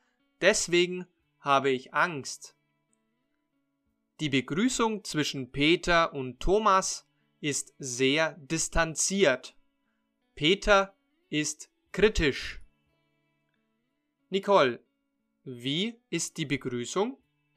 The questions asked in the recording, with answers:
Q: Nicole, wie ist die Begrüßung?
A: Sehr distanziert.